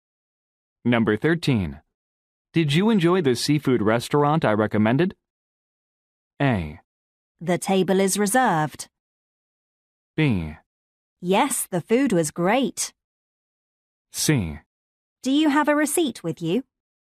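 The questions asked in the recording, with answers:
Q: Did you enjoy the seafood restaurant I recommended?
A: B: Yes, the food was great.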